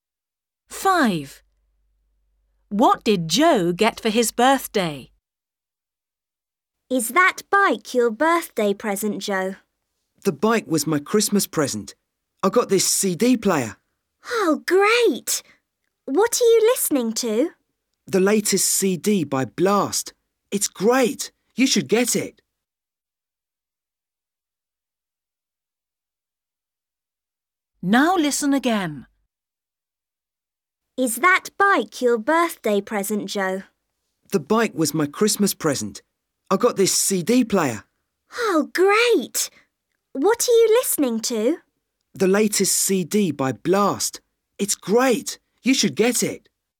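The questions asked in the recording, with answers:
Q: What did Joe get for his birthday?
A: a CD player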